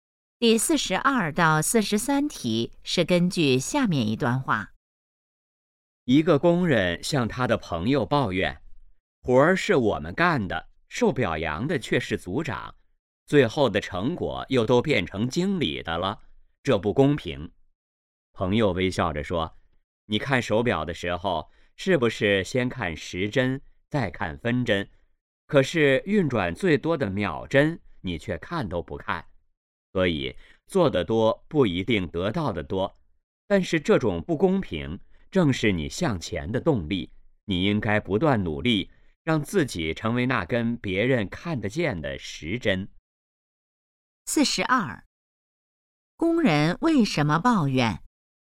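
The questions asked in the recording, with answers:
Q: 工人为什么抱怨?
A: 活儿是他们干的,表扬和成果却归组长和经理,觉得不公平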